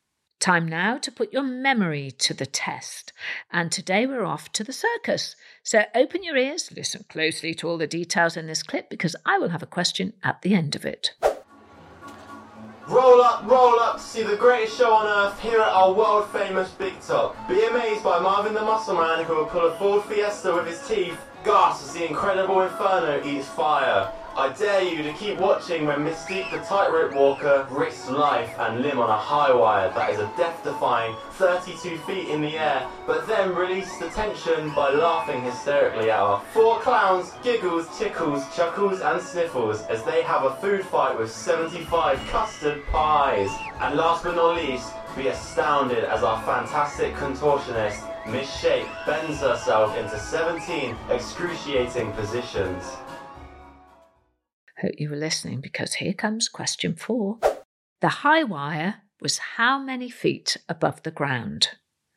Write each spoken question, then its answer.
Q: The high wire was how many feet above the ground?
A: And the answer was 32.